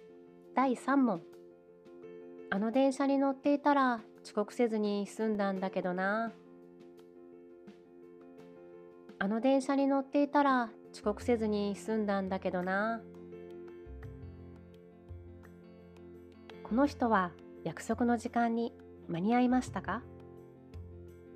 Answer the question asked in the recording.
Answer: 答えは間に合いませんでしたです。